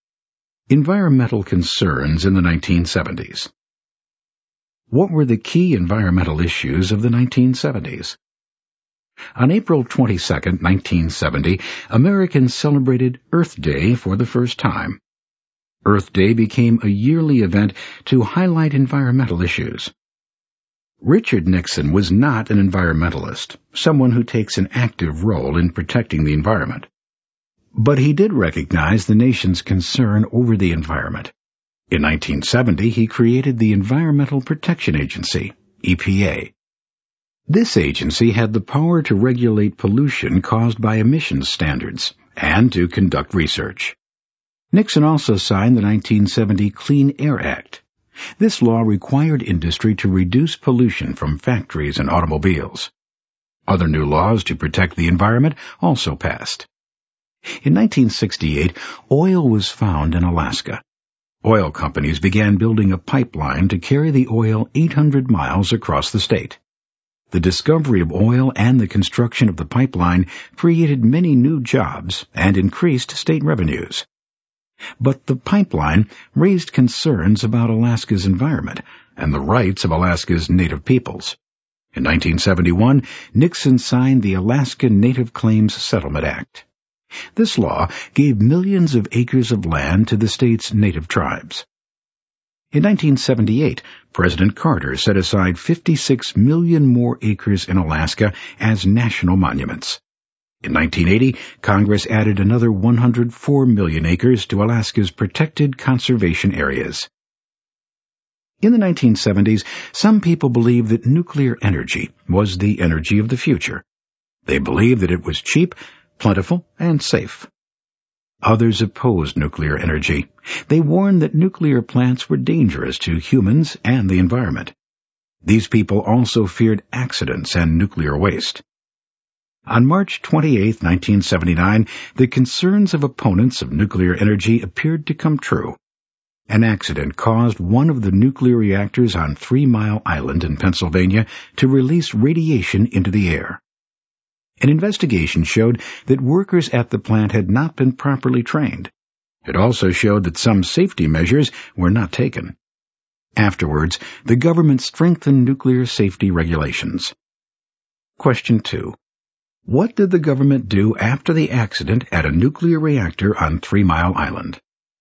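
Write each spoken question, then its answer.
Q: What did the government do after the accident at a nuclear reactor on Three Mile Island?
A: It strengthened nuclear safety regulations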